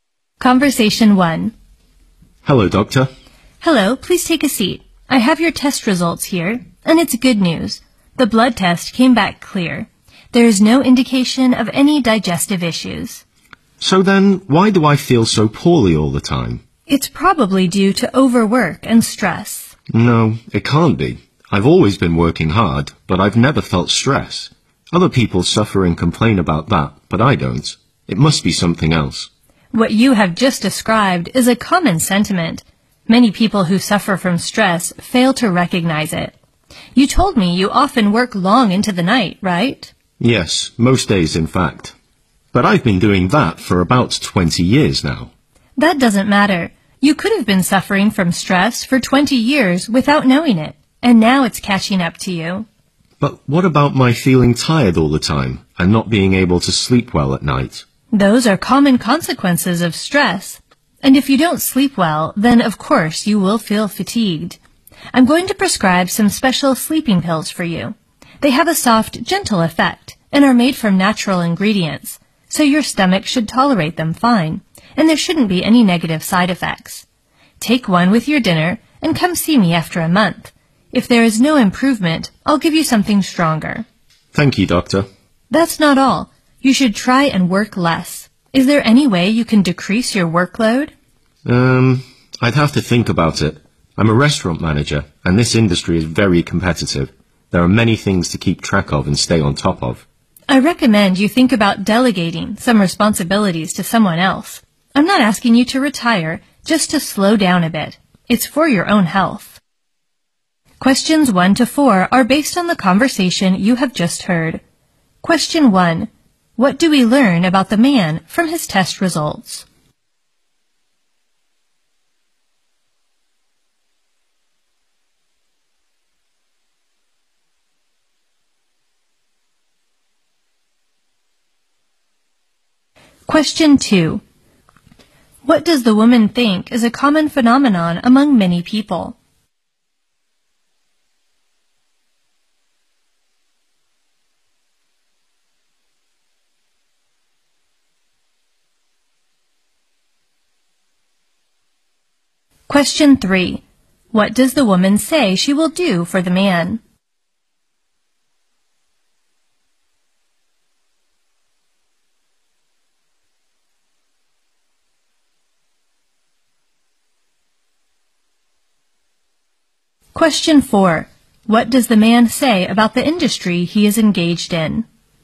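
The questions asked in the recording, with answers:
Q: What do we learn about the man from his test results?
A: His blood test came back clear, with no sign of digestive issues.

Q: What does the woman think is a common phenomenon among many people?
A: Many people who suffer from stress fail to recognize it.

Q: What does the woman say she will do for the man?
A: Prescribe him some special gentle sleeping pills.

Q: What does the man say about the industry he is engaged in?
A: The restaurant industry is very competitive.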